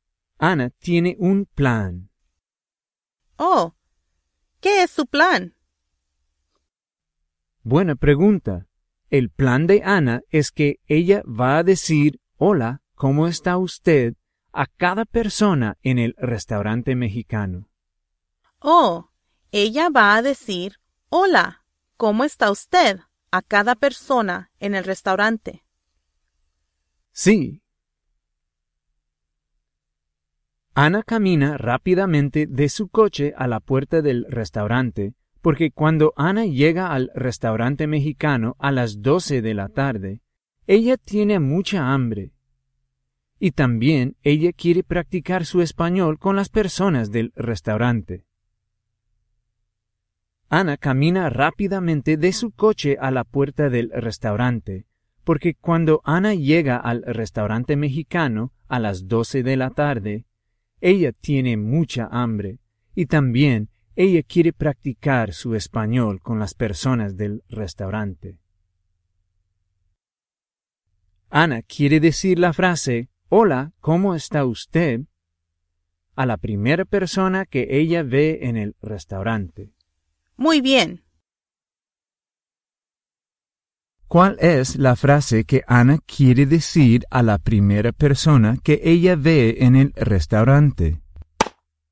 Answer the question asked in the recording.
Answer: Ana va a decir, "Hola, ¿cómo está usted?" a la primera persona que ella ve en el restaurante.